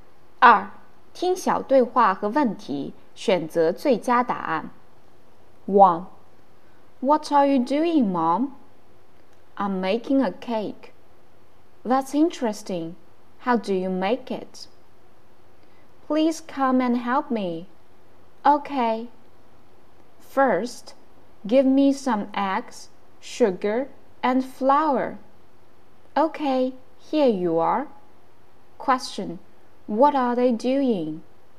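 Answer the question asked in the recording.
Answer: They are making a cake.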